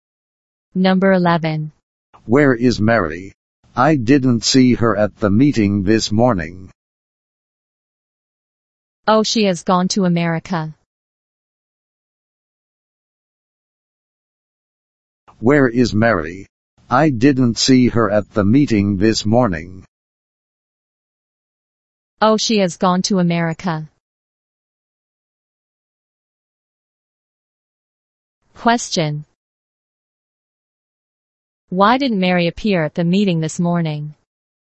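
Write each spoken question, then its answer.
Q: Why didn't Mary appear at the meeting this morning?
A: She has gone to America.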